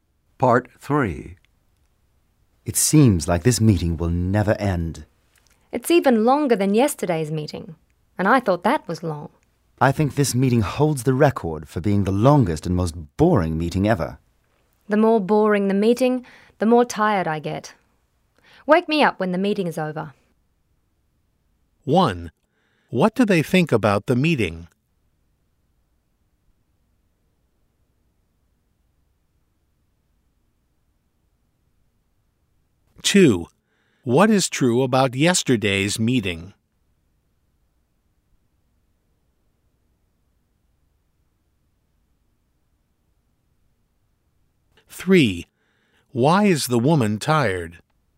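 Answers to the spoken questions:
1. It is very long and boring
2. It was long, but shorter than this one
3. Because the meeting is boring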